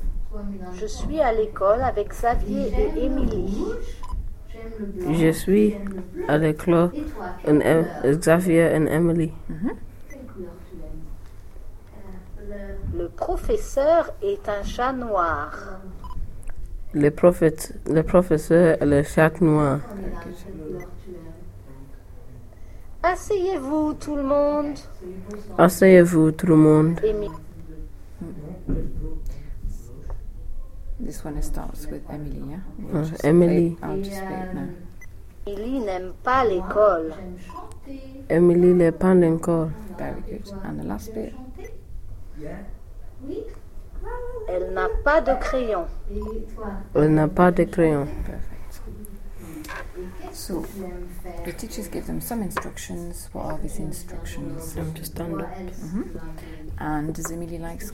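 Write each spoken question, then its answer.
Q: What are these instructions?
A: Sit down, everyone

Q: And does Emily like school?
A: No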